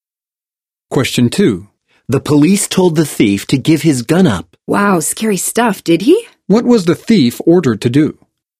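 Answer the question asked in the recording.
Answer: Give his gun up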